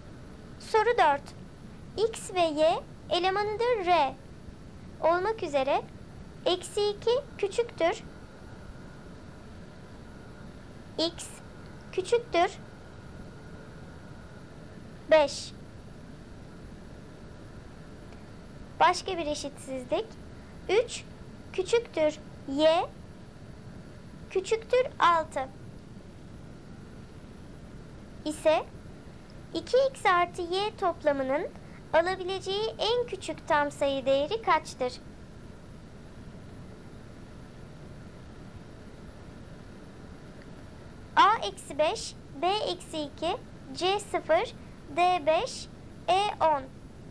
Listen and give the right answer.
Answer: Doğru cevap C 0.